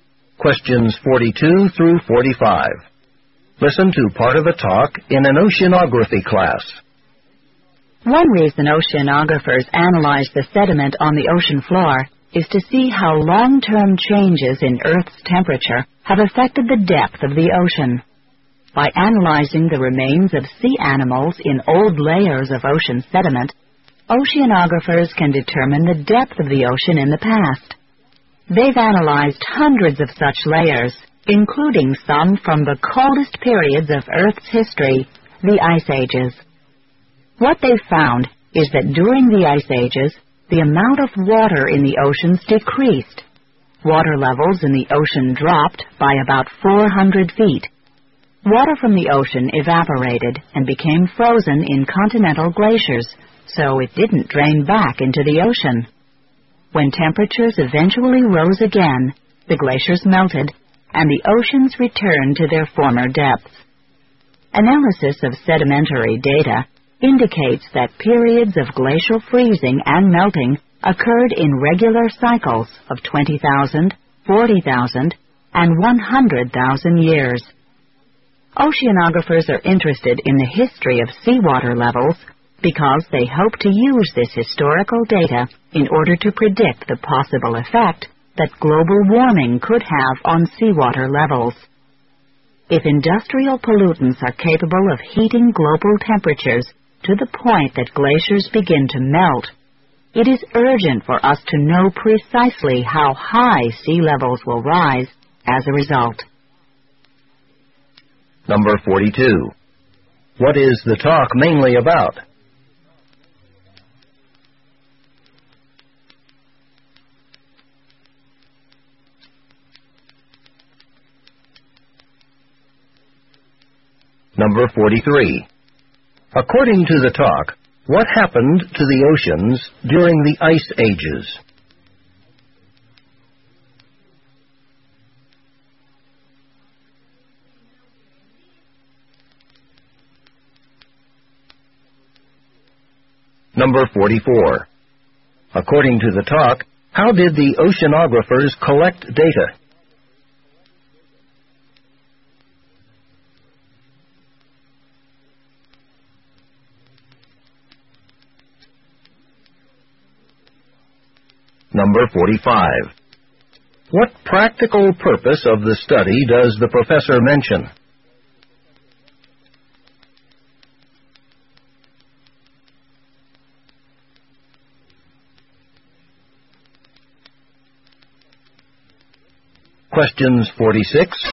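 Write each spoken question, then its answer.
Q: What is the talk mainly about?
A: How changes in Earth's temperature have affected ocean depth, as shown by ocean-floor sediment

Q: According to the talk, what happened to the oceans during the Ice Ages?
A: The amount of water decreased and sea levels dropped by about 400 feet

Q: According to the talk, how did the oceanographers collect data?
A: By analyzing the remains of sea animals in old layers of ocean sediment

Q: What practical purpose of the study does the professor mention?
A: To predict how global warming could affect sea levels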